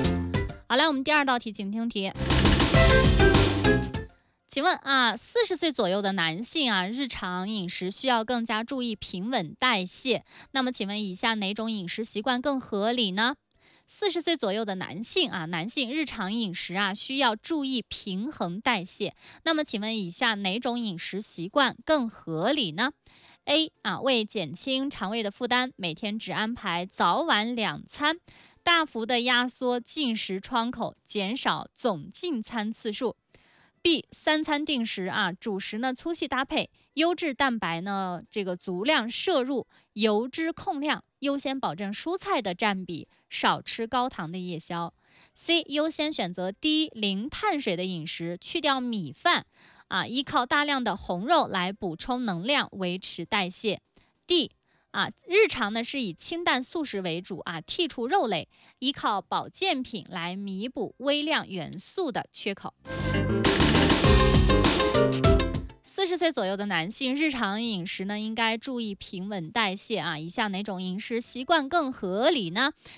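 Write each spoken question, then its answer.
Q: 那么请问以下哪种饮食习惯更合理呢?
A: B: 三餐定时,主食粗细搭配,优质蛋白足量摄入,油脂控量,优先保证蔬菜占比,少吃高糖夜宵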